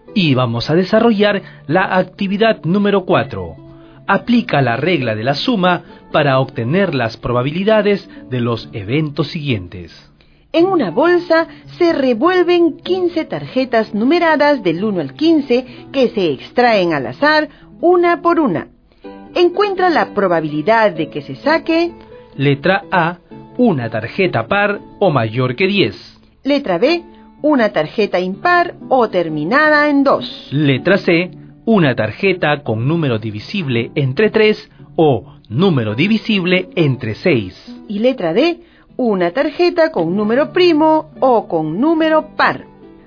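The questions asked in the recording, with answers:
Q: Letra A, una tarjeta par o mayor que 10.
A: 10/15 = 2/3

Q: Letra B, una tarjeta impar o terminada en 2.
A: 10/15 = 2/3

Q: Letra C, una tarjeta con número divisible entre 3 o número divisible entre 6.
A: 5/15 = 1/3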